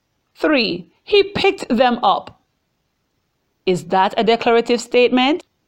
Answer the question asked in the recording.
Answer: Yes. In this example, a statement is being made.